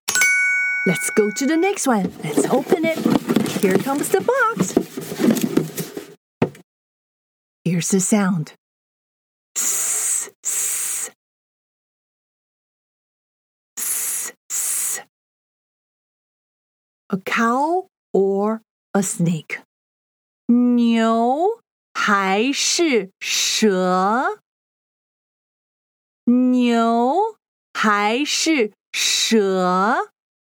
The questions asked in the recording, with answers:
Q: A cow or a snake?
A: 你对了。蛇。